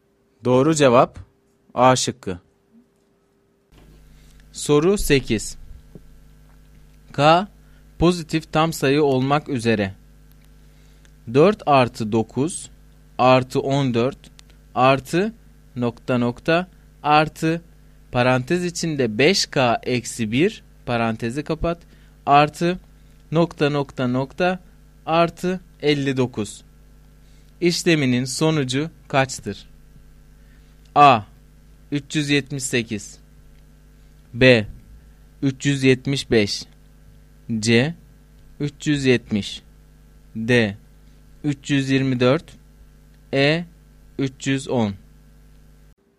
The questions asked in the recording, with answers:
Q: İşleminin sonucu kaçtır?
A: Doğru cevap A şıkkı.